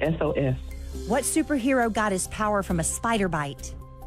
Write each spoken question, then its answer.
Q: What superhero got his power from a spider bite?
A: Spider-Man.